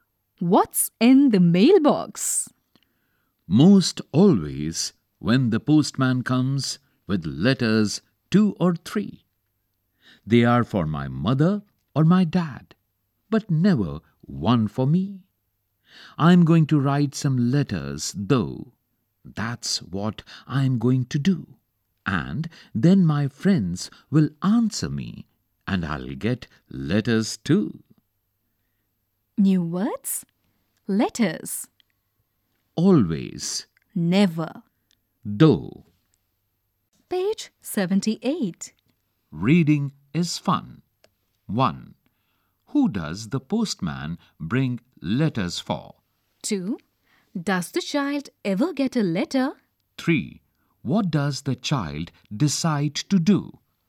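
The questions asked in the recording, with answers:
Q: Who does the postman bring letters for?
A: For the child's mother or dad

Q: Does the child ever get a letter?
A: No, never

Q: What does the child decide to do?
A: Write some letters to friends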